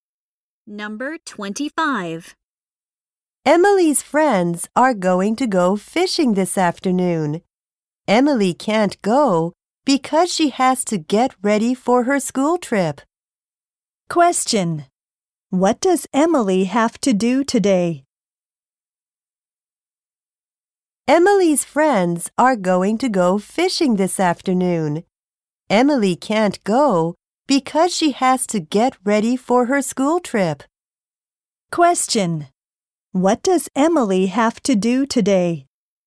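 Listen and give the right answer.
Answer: Get ready for her school trip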